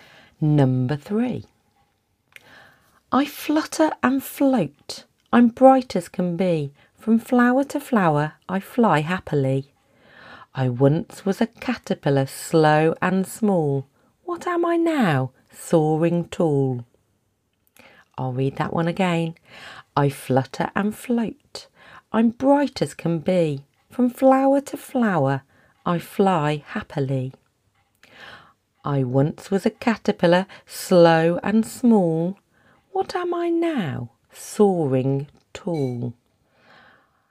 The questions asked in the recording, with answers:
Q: What am I now? Soaring tall.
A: Of course, the answer was a butterfly.